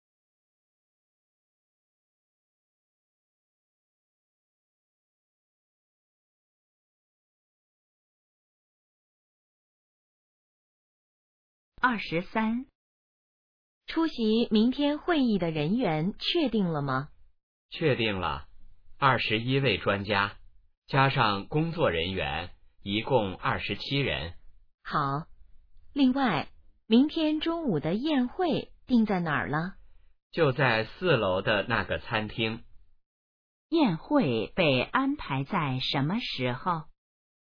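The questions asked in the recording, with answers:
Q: 宴会被安排在什么时候?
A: 明天中午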